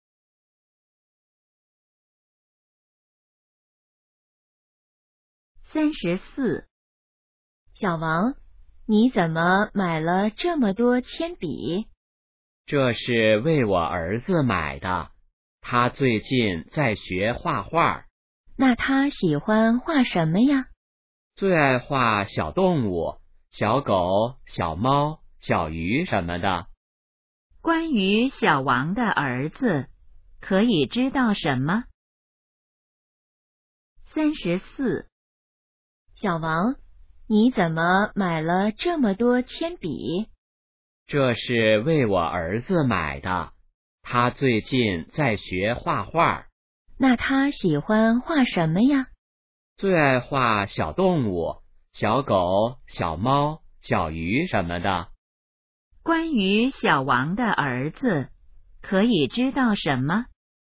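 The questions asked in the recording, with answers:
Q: 关于小王的儿子,可以知道什么?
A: 在学画画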